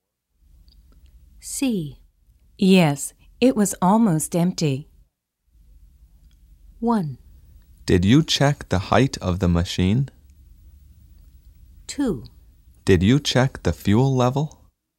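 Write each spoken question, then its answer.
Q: Yes, it was almost empty.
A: 2: Did you check the fuel level?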